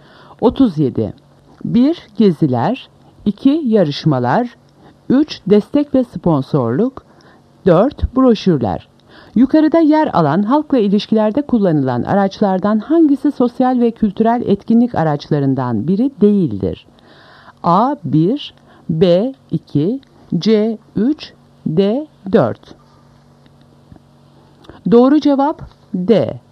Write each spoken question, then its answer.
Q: Yukarıda yer alan halkla ilişkilerde kullanılan araçlardan hangisi sosyal ve kültürel etkinlik araçlarından biri değildir?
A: Doğru cevap D. 4.